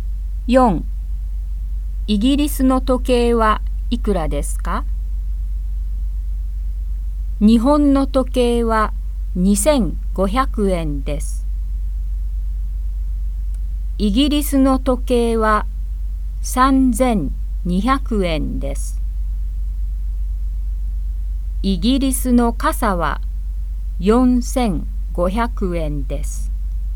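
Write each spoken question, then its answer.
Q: イギリスの時計はいくらですか?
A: 3200円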